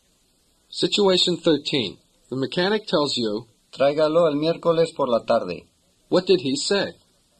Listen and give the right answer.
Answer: He said, bring it in Wednesday afternoon.